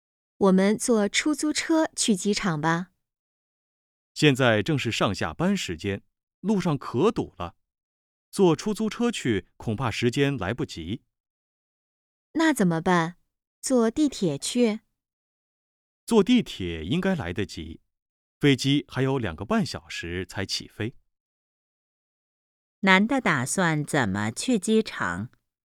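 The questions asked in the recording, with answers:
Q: 男的打算怎么去机场?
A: 坐地铁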